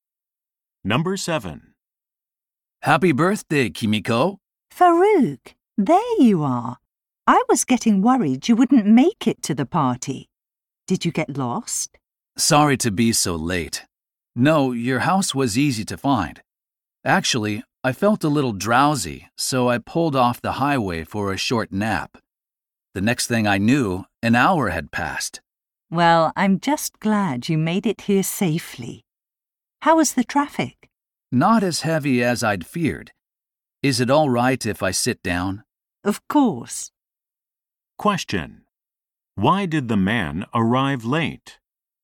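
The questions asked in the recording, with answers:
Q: Why did the man arrive late?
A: He stopped for a nap and slept for an hour.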